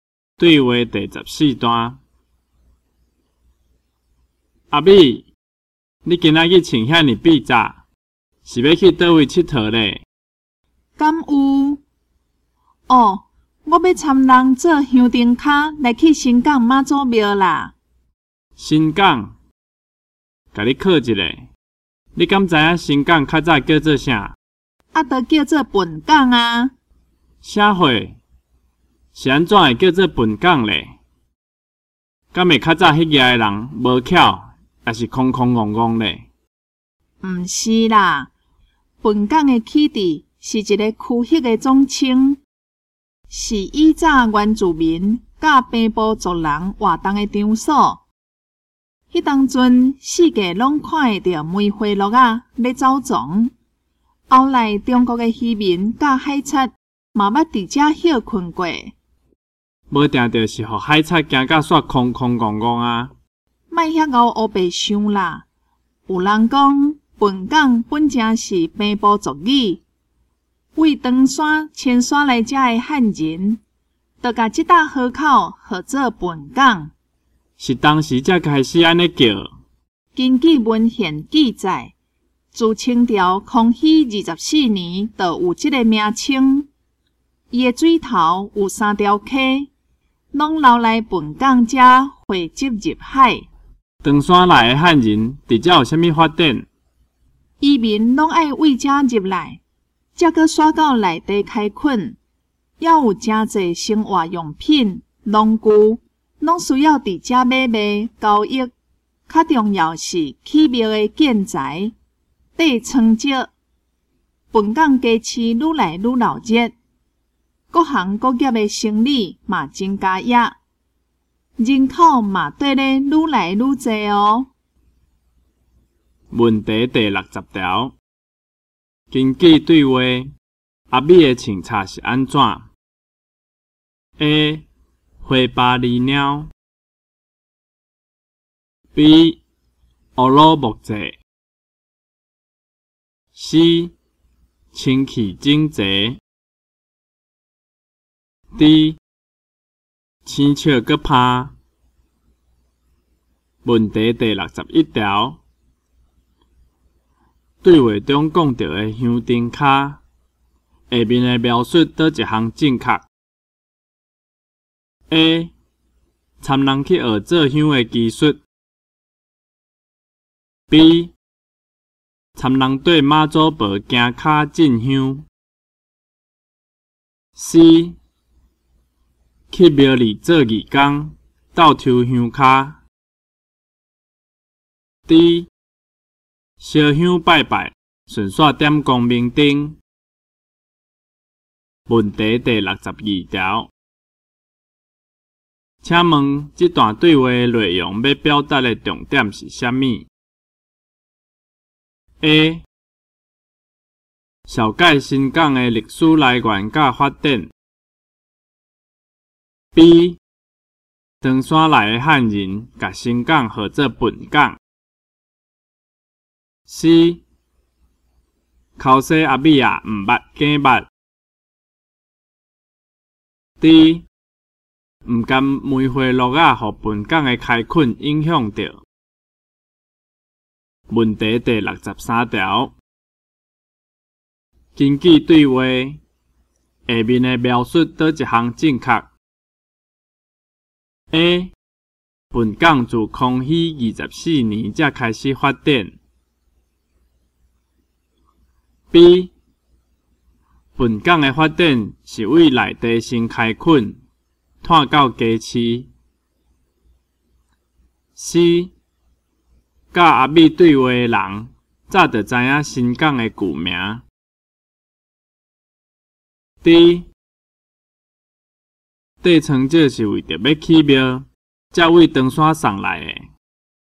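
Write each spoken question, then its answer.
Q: 根据对话,阿美的穿插是安怎 ?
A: C: 清气整齐

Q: 对话中讲到的香灯卡,下面的描述叨一项正确?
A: B: 参人对妈祖婆行脚进香

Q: 请问这段对话的内容要表达的重点是什么 ?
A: A: 小介新港的历史来源甲发展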